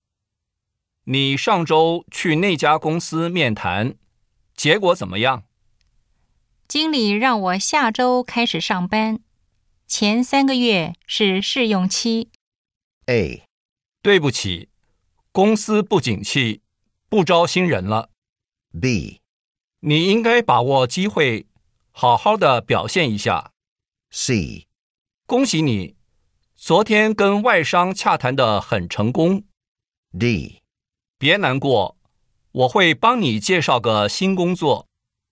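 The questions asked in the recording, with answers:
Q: 经理让我下周开始上班,前三个月是试用期。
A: B: 你应该把握机会,好好的表现一下。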